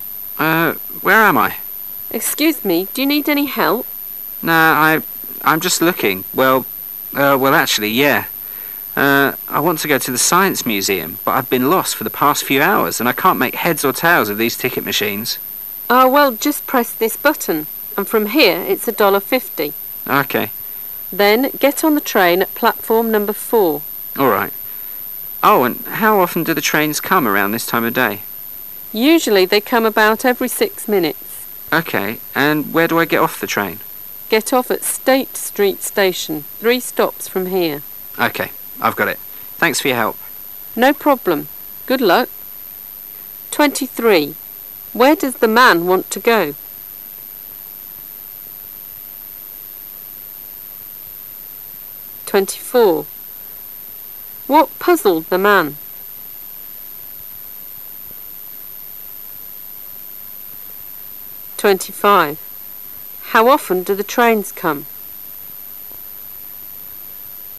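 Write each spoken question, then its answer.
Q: Where does the man want to go?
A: The Science Museum

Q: What puzzled the man?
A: The ticket machines

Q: How often do the trains come?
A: About every 6 minutes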